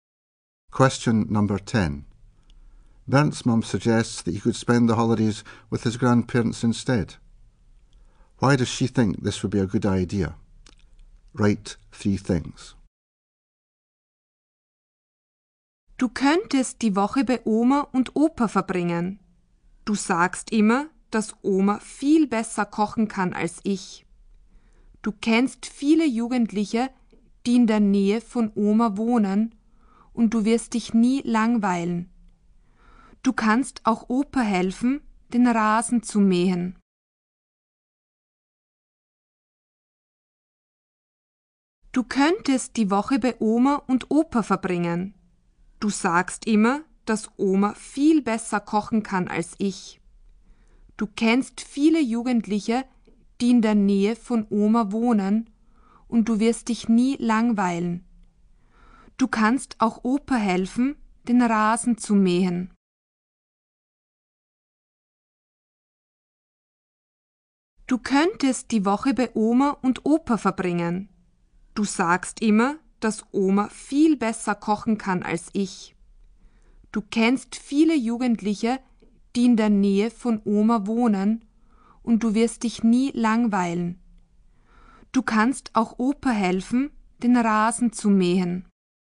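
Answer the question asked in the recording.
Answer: Grandma cooks better; he knows lots of young people near Grandma's and won't be bored; he can help Grandpa mow the lawn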